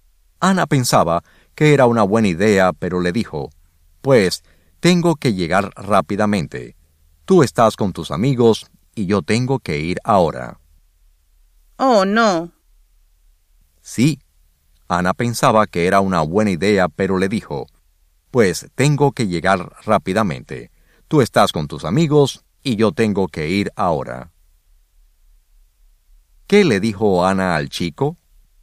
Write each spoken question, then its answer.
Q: ¿Qué le dijo Ana al chico?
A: Ana le dijo, «Pues tengo que llegar rápidamente. Tú estás con tus amigos y yo tengo que ir ahora».